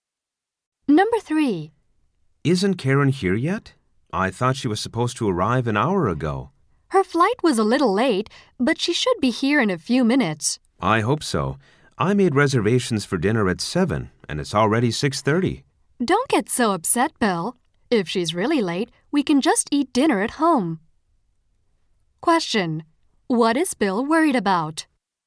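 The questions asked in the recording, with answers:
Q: What is Bill worried about?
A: That Karen will be too late for their 7 o'clock dinner reservation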